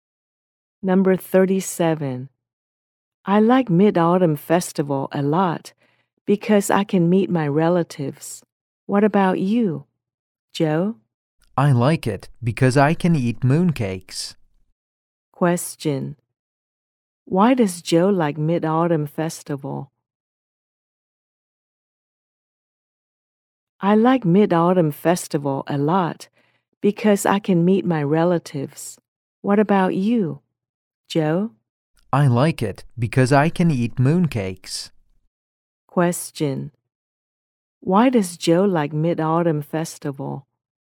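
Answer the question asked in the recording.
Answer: He can eat mooncakes.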